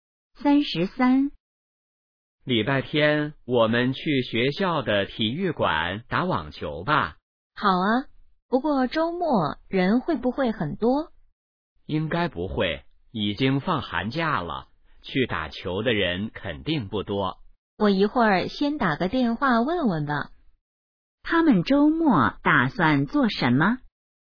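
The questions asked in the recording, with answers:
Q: 他们周末打算做什么?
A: 打网球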